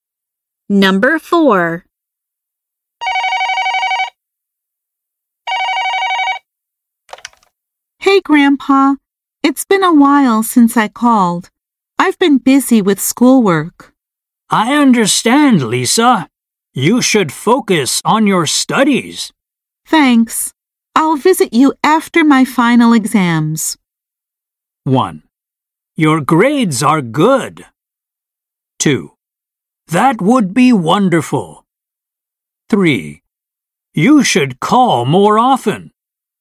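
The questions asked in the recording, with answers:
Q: Thanks. I'll visit you after my final exams.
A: 2: That would be wonderful.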